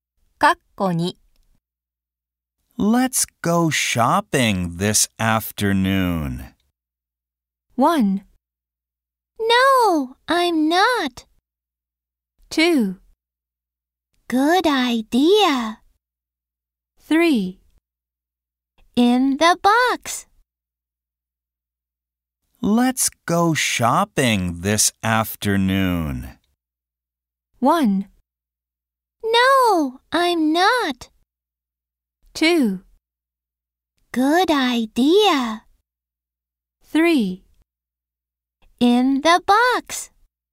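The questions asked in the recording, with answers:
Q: Let's go shopping this afternoon.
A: 2: Good idea.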